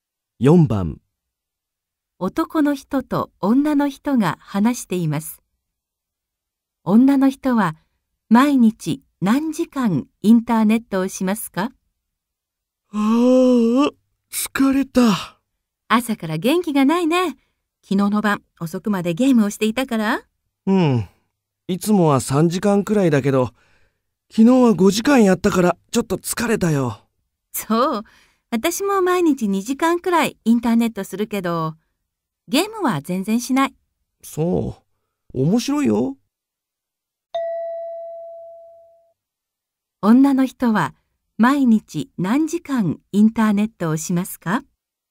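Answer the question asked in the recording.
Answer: 2時間くらい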